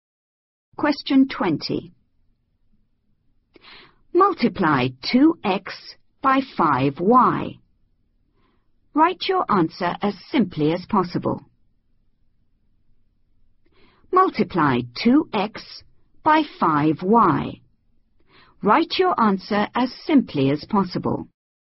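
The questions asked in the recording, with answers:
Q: Multiply 2x by 5y. Write your answer as simply as possible.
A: 10xy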